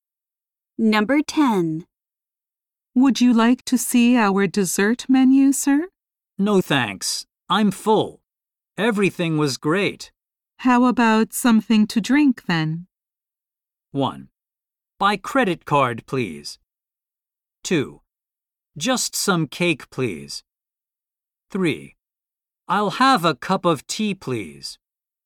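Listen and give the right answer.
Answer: 3: I'll have a cup of tea, please.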